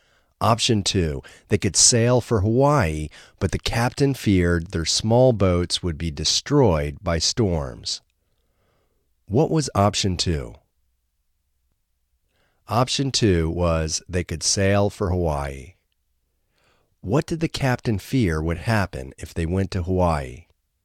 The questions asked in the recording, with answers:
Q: What did the captain fear would happen if they went to Hawaii?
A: The captain feared their small boats would be destroyed by storms.